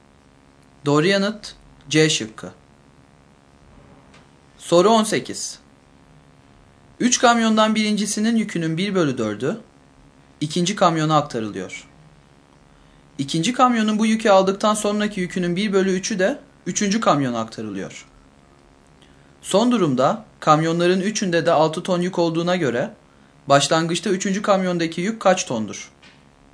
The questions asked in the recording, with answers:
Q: Son durumda kamyonların üçünde de 6 ton yük olduğuna göre başlangıçta üçüncü kamyondaki yük kaç tondur?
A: Doğru yanıt C şıkkı.